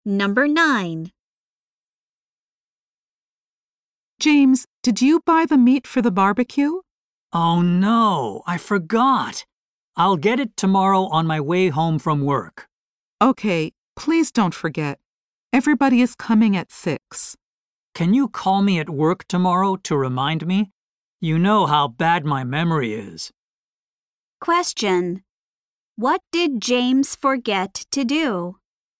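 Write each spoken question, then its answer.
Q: What did James forget to do?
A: Buy the meat for the barbecue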